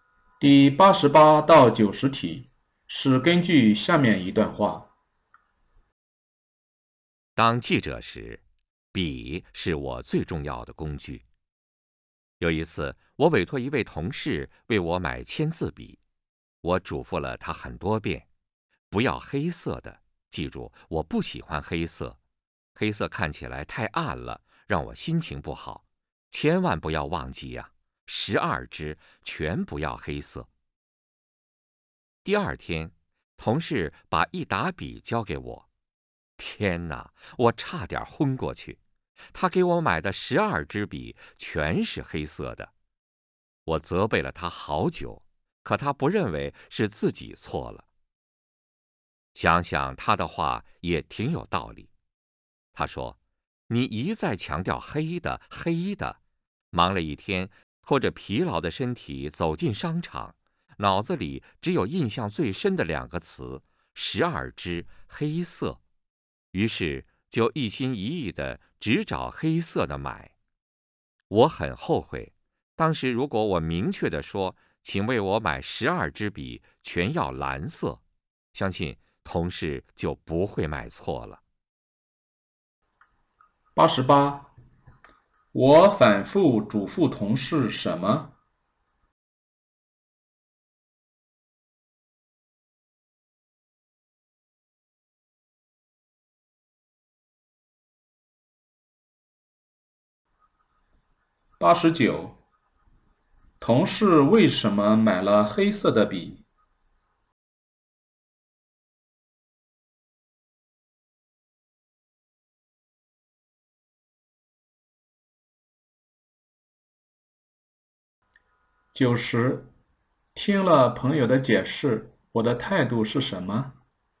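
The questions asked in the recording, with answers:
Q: 我反复嘱咐同事什么?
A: 不要买黑色的笔

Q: 同事为什么买了黑色的笔?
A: 他很累,脑子里只记住了"12支黑色"

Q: 听了朋友的解释,我的态度是什么?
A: 觉得他有道理,很后悔自己没说清楚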